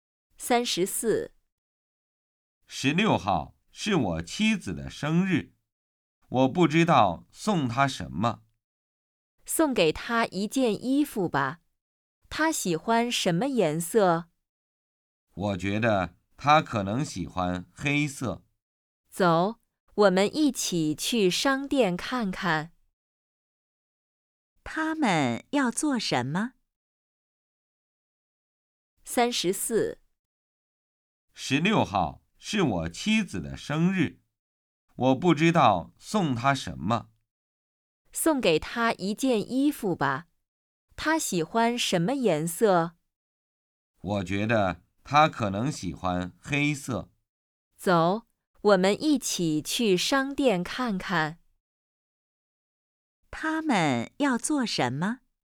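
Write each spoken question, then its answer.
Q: 他们要做什么?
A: 去商店买衣服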